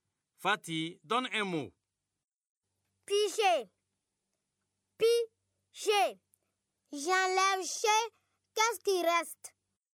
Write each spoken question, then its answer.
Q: Qu'est-ce qui reste?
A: C'est pis, monsieur.